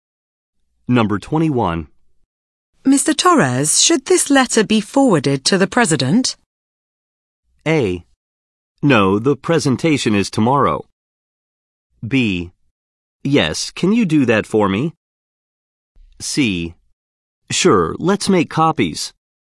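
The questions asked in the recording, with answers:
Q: Mr. Torres, should this letter be forwarded to the president?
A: B: Yes, can you do that for me?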